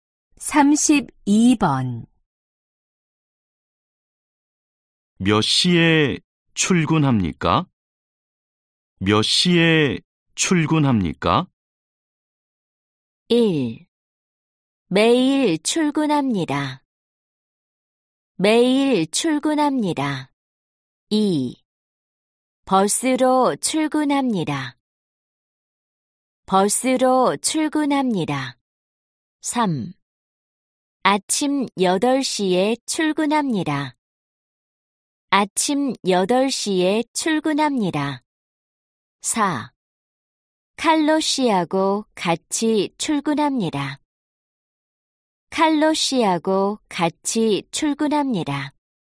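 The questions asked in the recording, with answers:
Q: 몇 시에 출근합니까?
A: 3: 아침 8시에 출근합니다.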